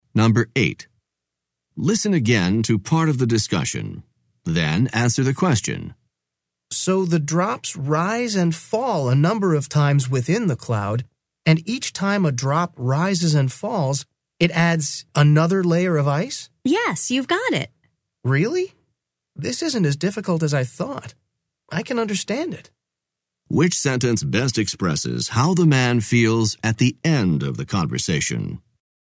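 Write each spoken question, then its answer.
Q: Which sentence best expresses how the man feels at the end of the conversation?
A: He is pleasantly surprised that the topic is easier to understand than he expected.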